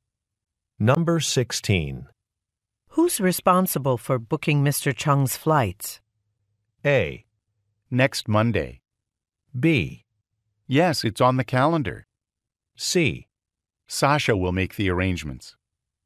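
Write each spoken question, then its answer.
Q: Who's responsible for booking Mr. Chung's flights?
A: C: Sasha will make the arrangements.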